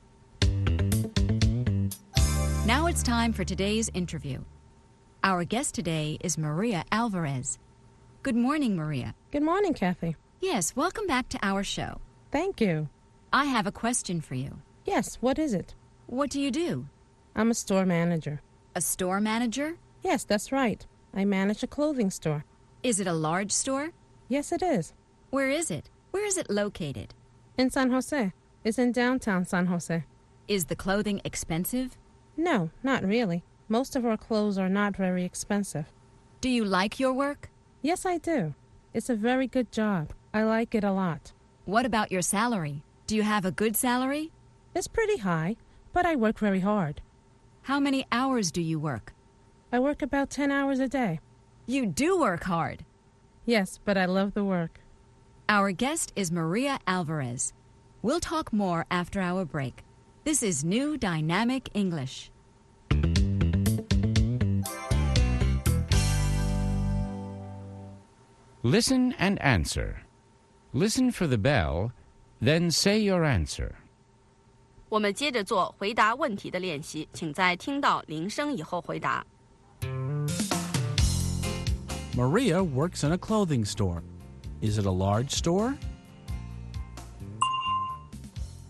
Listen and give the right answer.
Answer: Yes, it is. It's large.